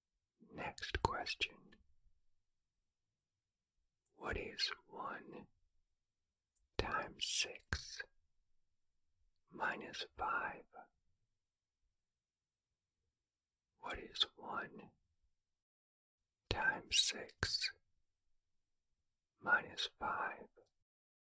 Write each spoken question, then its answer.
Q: What is 1 times 6 minus 5?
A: The answer is 1.